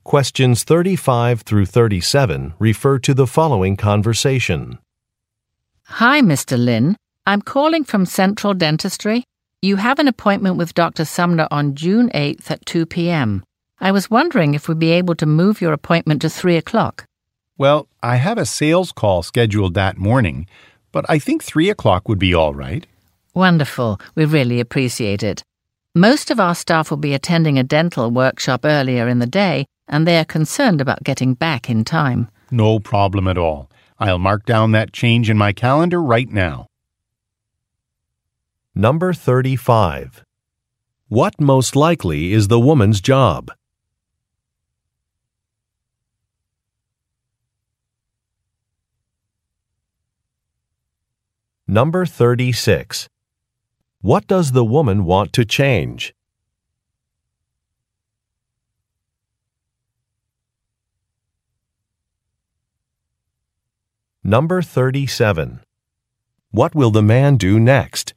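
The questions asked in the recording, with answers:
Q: What most likely is the woman's job?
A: Receptionist at a dental office

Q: What does the woman want to change?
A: The time of an appointment

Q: What will the man do next?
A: Update his calendar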